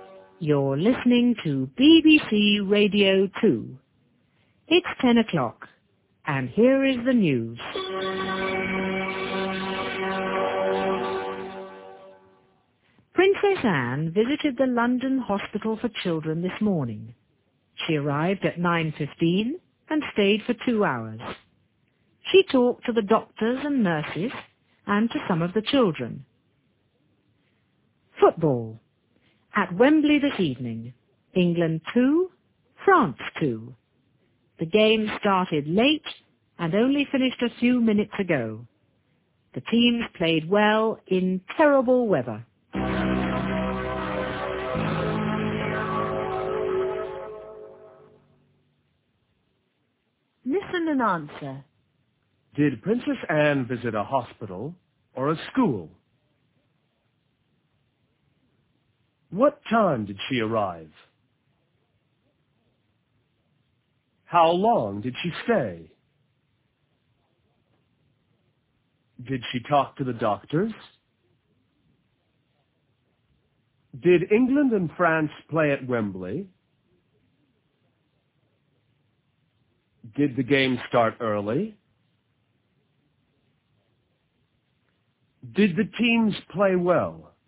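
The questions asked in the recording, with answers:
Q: Did Princess Anne visit a hospital or a school?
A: A hospital

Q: What time did she arrive?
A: At 9:15

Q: How long did she stay?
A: For 2 hours

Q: Did she talk to the doctors?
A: Yes, she did

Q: Did England and France play at Wembley?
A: Yes, they did

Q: Did the game start early?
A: No, it started late

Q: Did the teams play well?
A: Yes, they did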